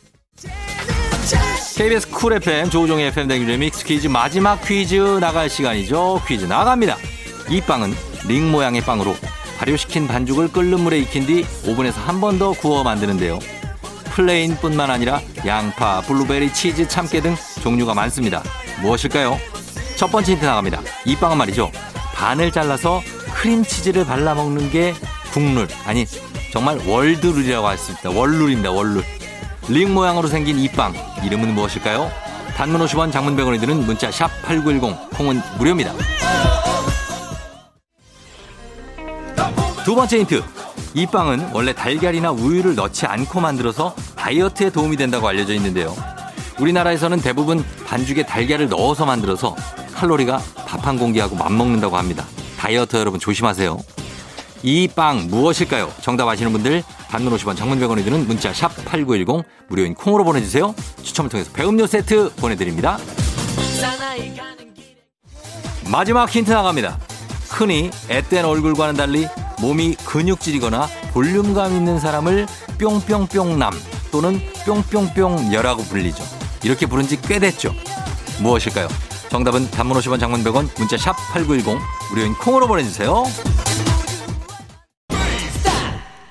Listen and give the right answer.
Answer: 베이글이죠